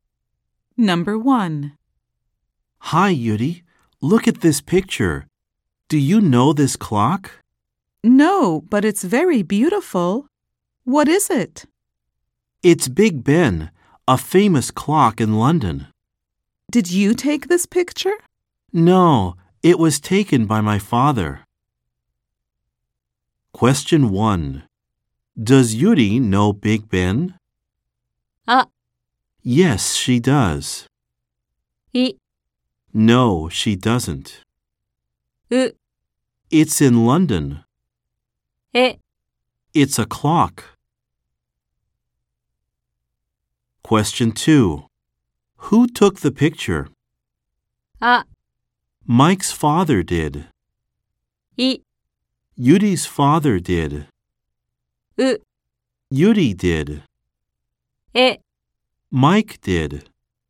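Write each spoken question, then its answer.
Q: Does Yuri know Big Ben?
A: い: No, she doesn't.

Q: Who took the picture?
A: あ: Mike's father did.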